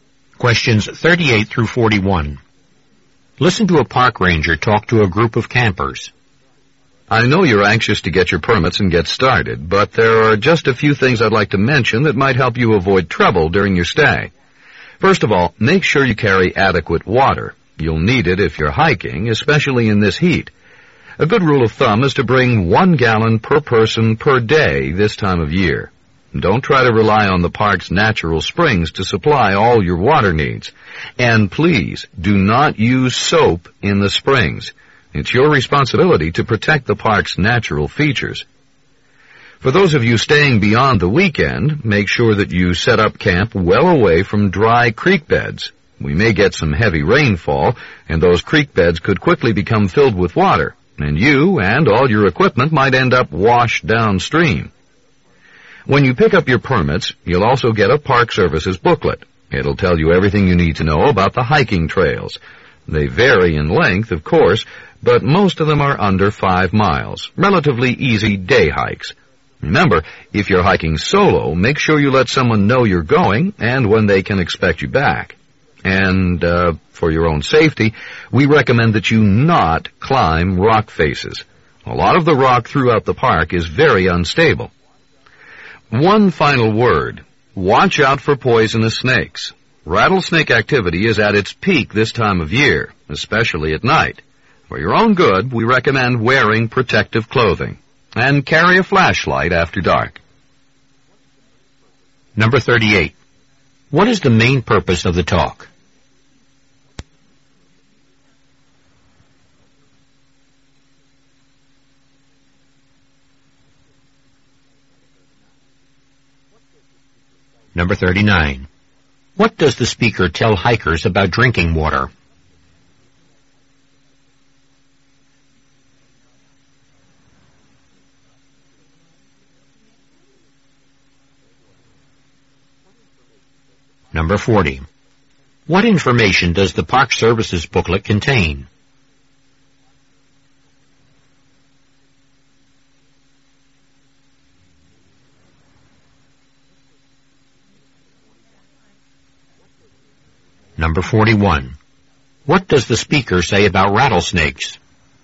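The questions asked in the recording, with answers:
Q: What is the main purpose of the talk?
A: To give campers safety advice for their stay in the park

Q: What does the speaker tell hikers about drinking water?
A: Bring 1 gallon per person per day; don't rely on the park's springs

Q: What information does the Park Service's booklet contain?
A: Information about the hiking trails

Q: What does the speaker say about rattlesnakes?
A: They are most active at this time of year, especially at night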